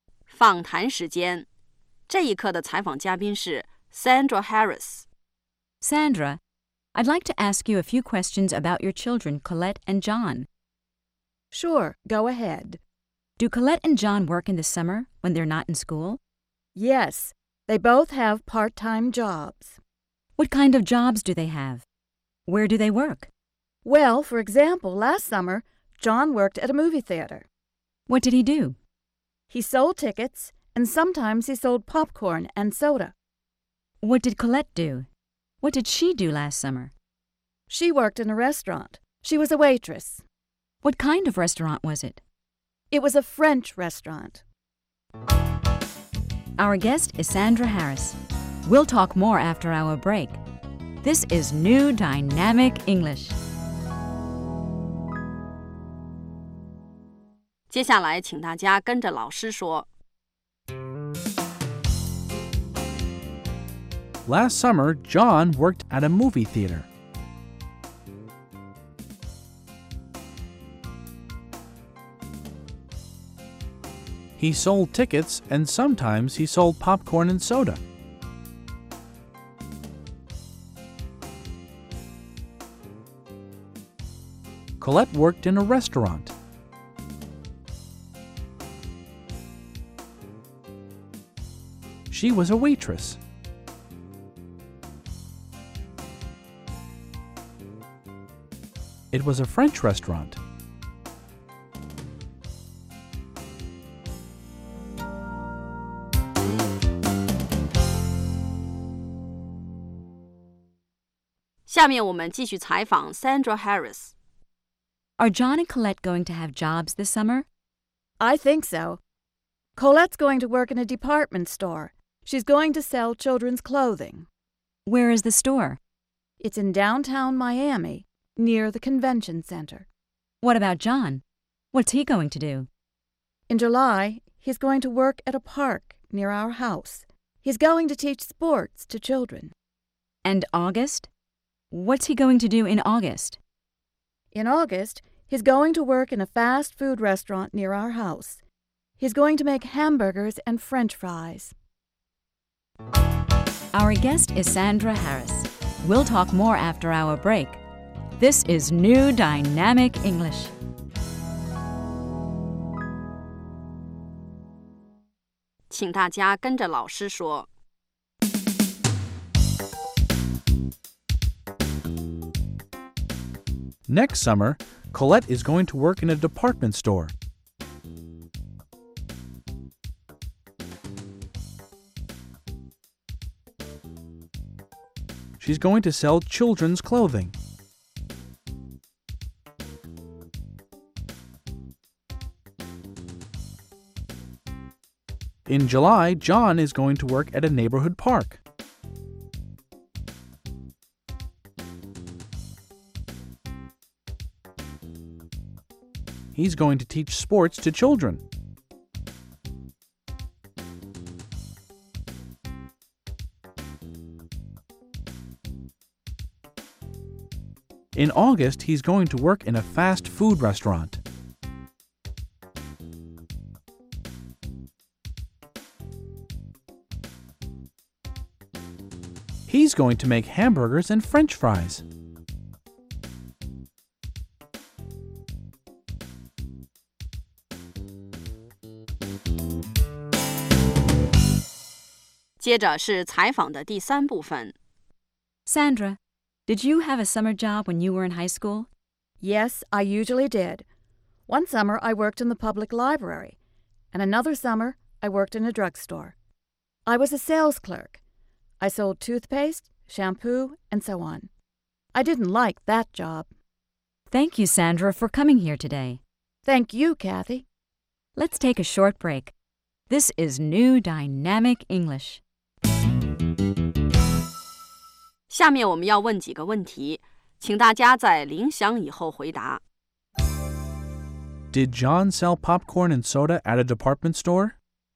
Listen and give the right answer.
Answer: No, he didn't. He sold popcorn and soda at a movie theater.